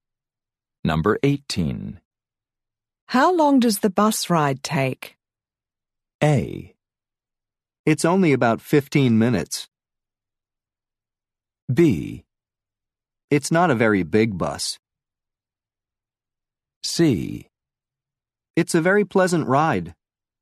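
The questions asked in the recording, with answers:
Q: How long does the bus ride take?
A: A: It's only about 15 minutes.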